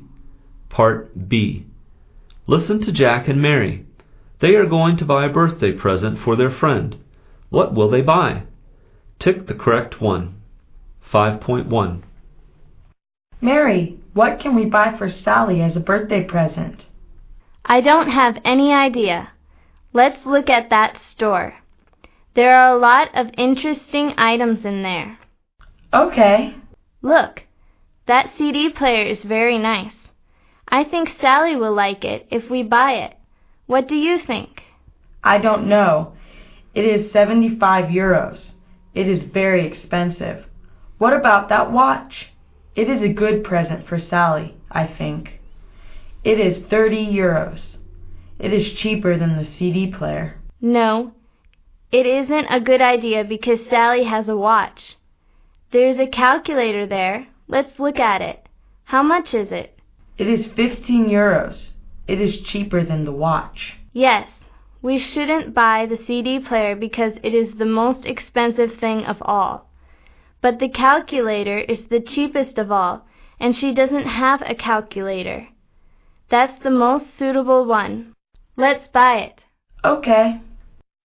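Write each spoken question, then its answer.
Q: What will they buy?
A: A calculator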